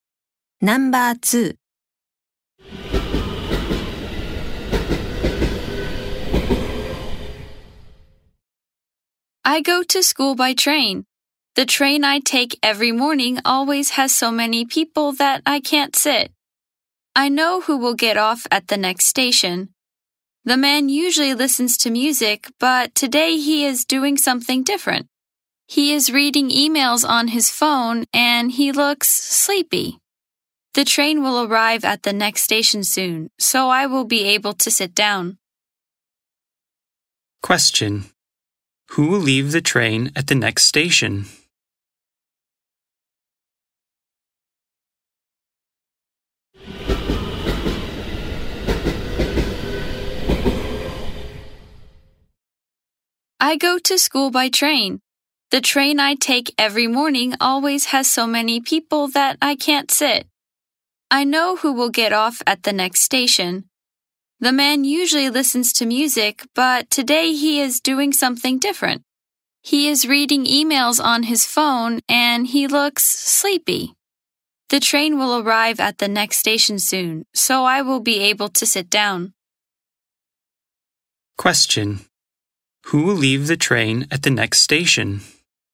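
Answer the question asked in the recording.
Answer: The man reading emails on his phone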